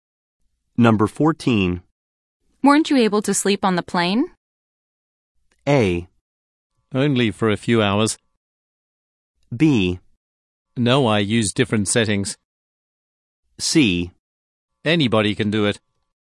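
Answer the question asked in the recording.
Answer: A: Only for a few hours.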